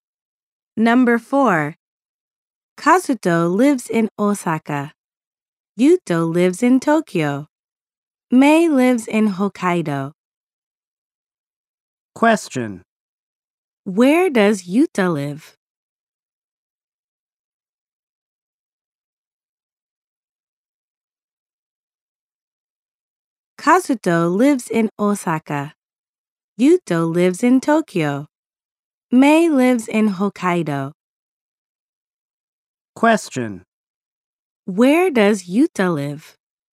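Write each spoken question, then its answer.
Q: Where does Yuta live?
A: In Tokyo.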